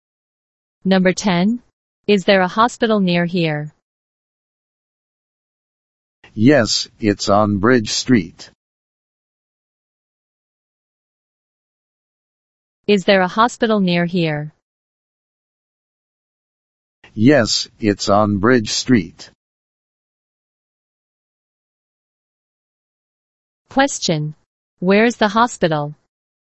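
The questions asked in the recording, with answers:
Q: Where is the hospital?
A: On Bridge Street.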